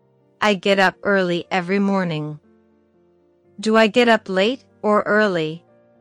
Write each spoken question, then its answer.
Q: Do I get up late or early?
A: Early. I get up early.